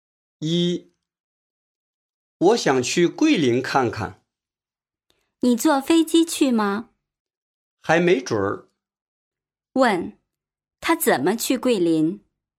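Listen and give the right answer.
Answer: 还没决定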